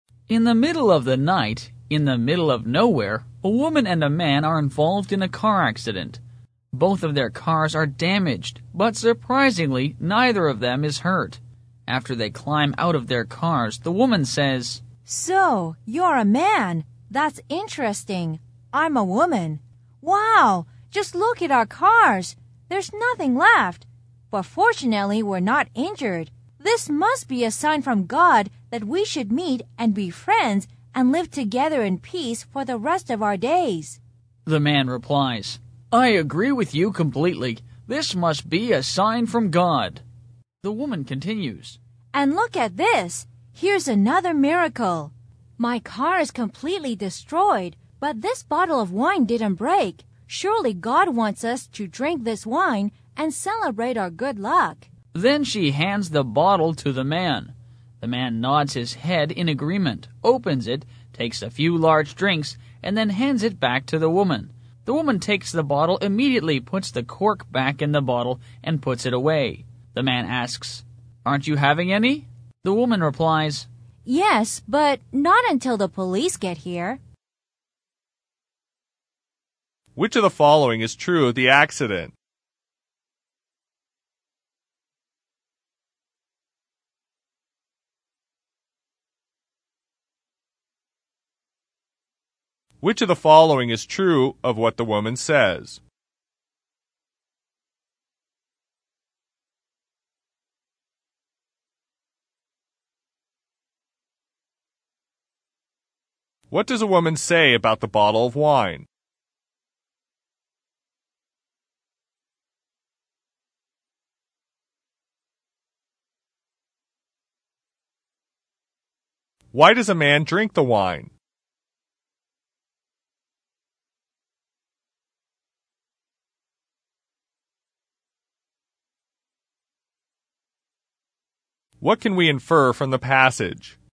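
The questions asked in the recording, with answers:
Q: What does a woman say about the bottle of wine?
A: It didn't break, which is a miracle; God must want them to drink it and celebrate.

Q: Why does a man drink the wine?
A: The woman gives it to him, saying God wants them to drink it and celebrate their luck.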